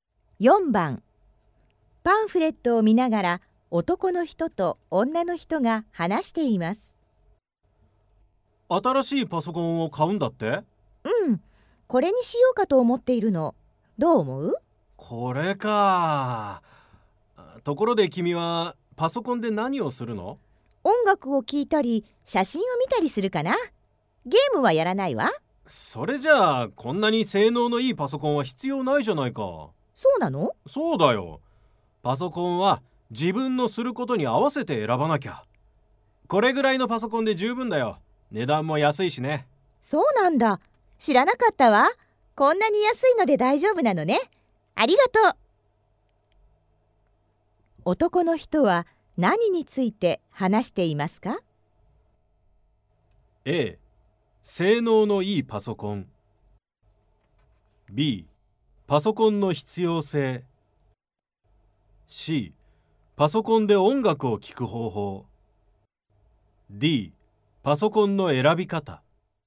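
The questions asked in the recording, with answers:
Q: 男の人は何について話していますか?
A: D: パソコンの選び方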